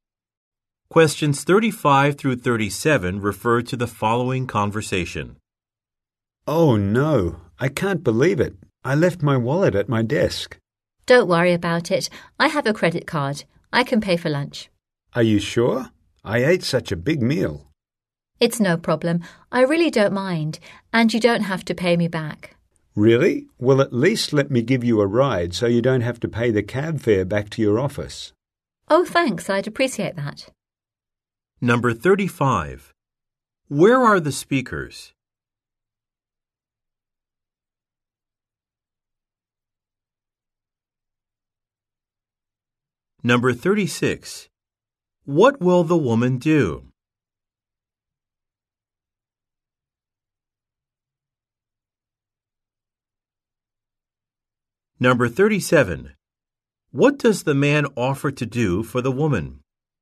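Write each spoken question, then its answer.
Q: Where are the speakers?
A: At a restaurant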